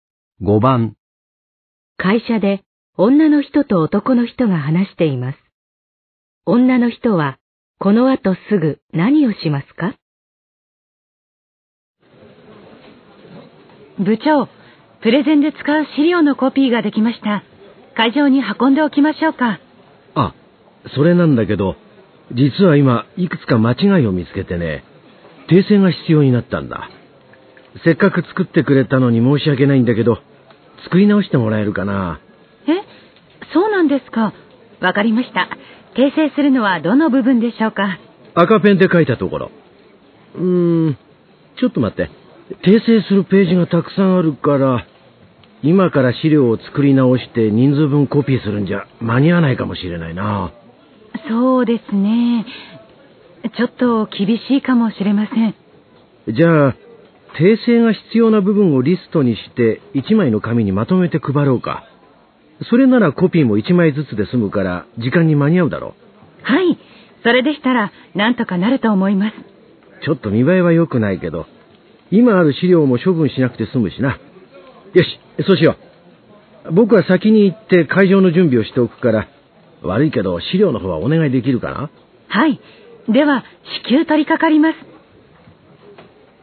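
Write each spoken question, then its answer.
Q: 女の人はこの後すぐ何をしますか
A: 訂正が必要な部分をリストにして1枚の紙にまとめる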